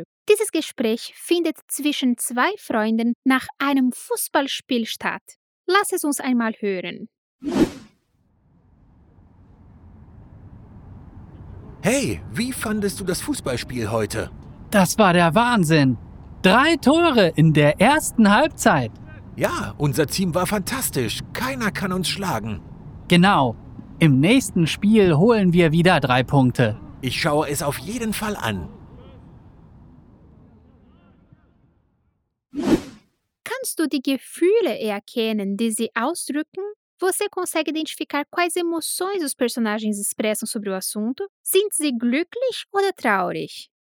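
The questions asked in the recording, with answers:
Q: Sind sie glücklich oder traurig?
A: glücklich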